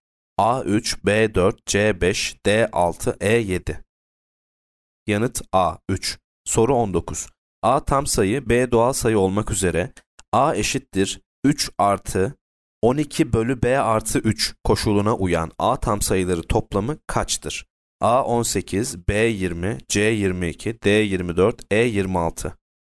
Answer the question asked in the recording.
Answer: Yanıt C 22.